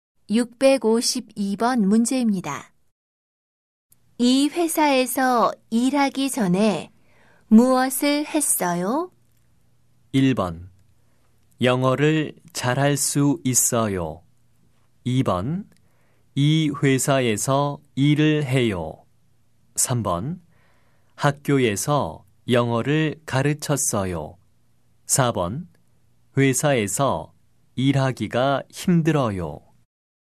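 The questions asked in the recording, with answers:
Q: 이 회사에서 일하기 전에 무엇을 했어요?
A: 3: 학교에서 영어를 가르쳤어요.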